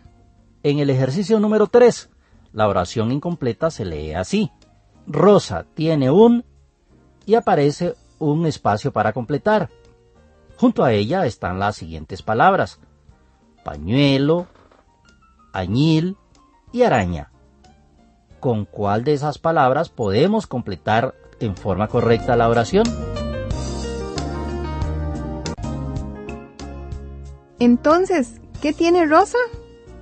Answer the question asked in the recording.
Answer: Efectivamente, Rosa tiene un pañuelo.